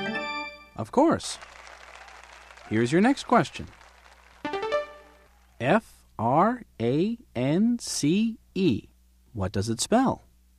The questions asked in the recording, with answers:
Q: F-R-A-N-C-E. What does it spell?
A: It spells France.